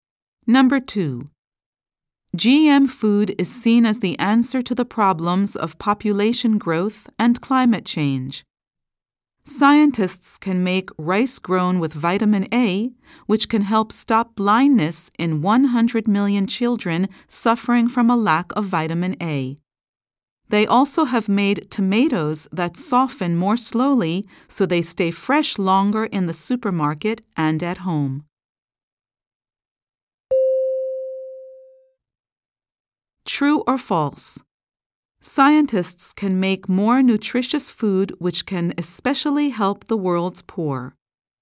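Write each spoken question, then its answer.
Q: True or false? Scientists can make more nutritious food which can especially help the world's poor.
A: True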